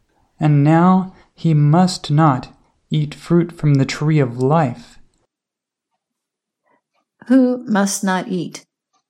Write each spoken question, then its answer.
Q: Who must not eat?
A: The man must not eat.